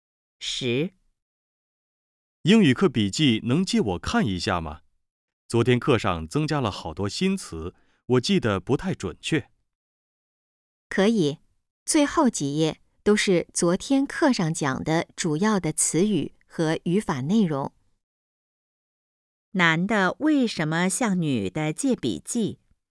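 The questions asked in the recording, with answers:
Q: 男的为什么向女的借笔记?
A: 昨天课上的新词记得不太准确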